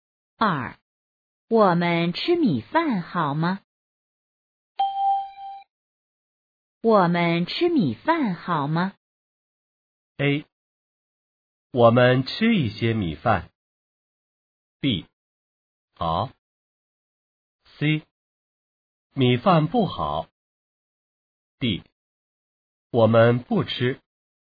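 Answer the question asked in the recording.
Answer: B: 好。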